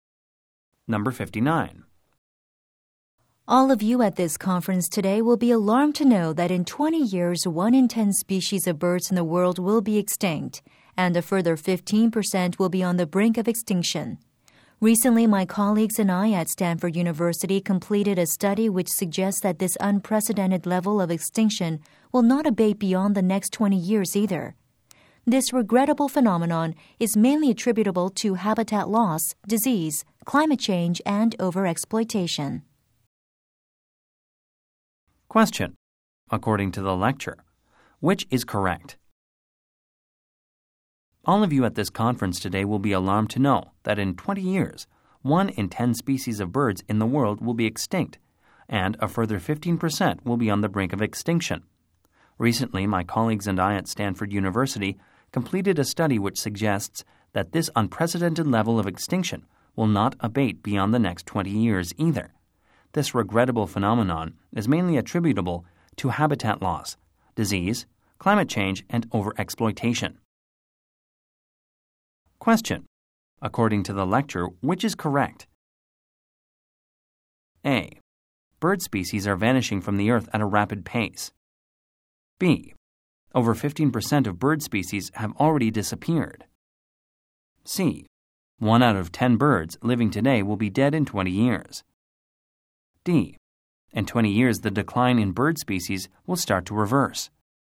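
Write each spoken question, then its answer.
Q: According to the lecture, which is correct?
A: A: Bird species are vanishing from the earth at a rapid pace.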